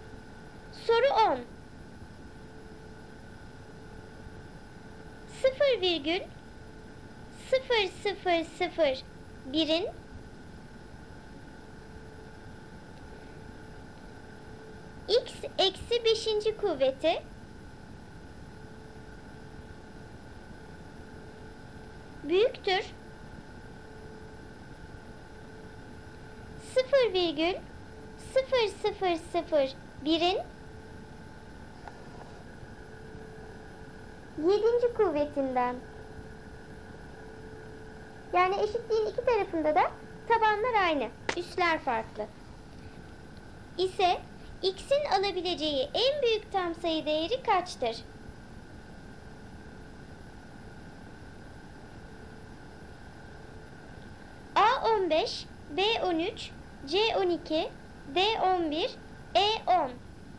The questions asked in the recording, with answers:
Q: İse x'in alabileceği en büyük tam sayı değeri kaçtır?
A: Doğru cevap D 11.